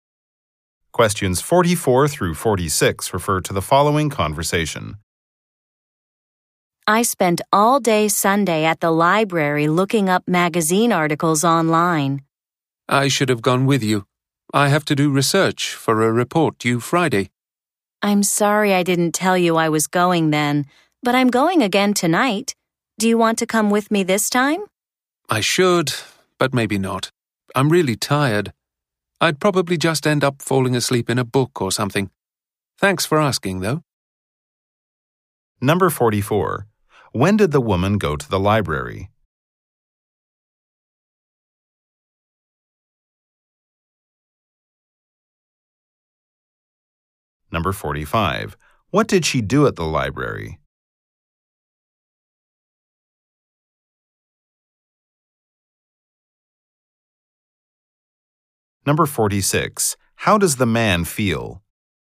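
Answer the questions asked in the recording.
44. On Sunday
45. Looked up magazine articles online
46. Tired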